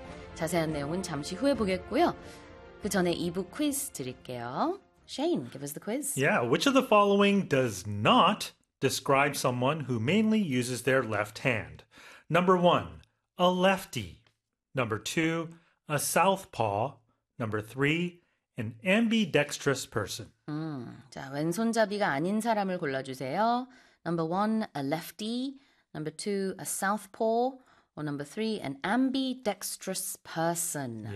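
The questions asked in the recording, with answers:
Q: which of the following does not describe someone who mainly uses their left hand?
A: 3: an ambidextrous person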